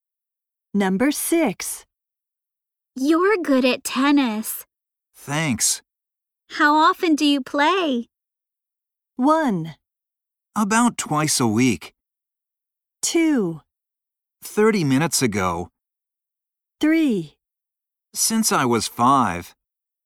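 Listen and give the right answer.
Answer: 1: About twice a week.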